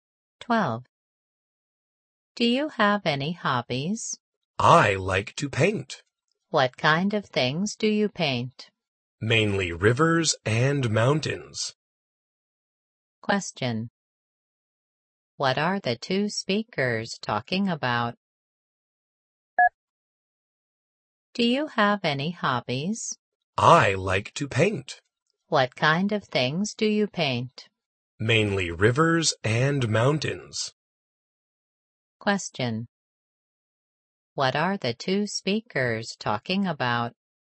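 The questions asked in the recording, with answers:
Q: What are the two speakers talking about?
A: Hobbies (painting)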